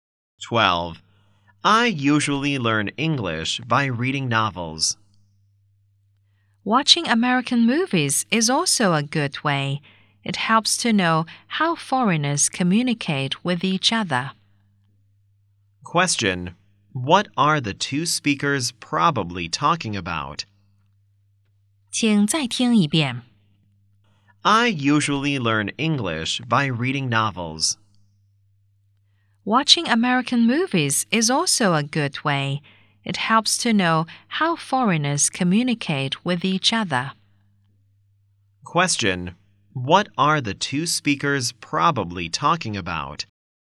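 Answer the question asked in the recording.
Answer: Ways of learning English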